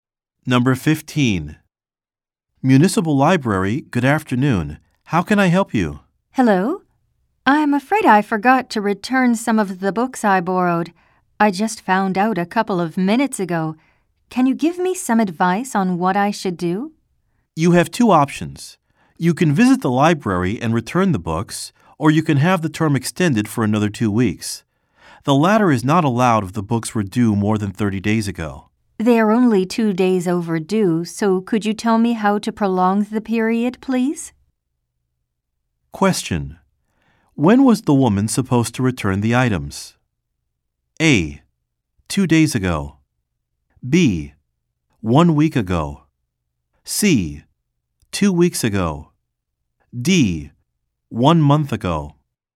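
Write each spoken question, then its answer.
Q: When was the woman supposed to return the items?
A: A: 2 days ago.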